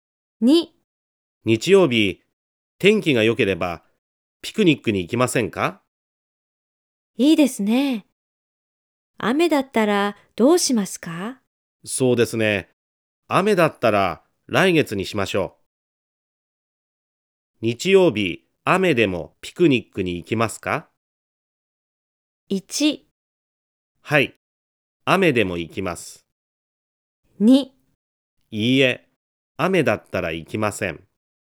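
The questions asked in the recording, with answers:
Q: 日曜日、雨でもピクニックに行きますか?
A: 2: いいえ、雨だったら行きません。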